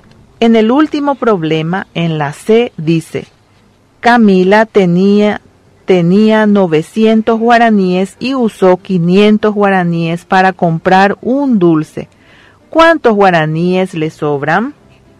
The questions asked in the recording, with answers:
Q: ¿Cuántos guaraníes le sobran?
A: Quiere decir que a Camila le sobró 400 guaraníes.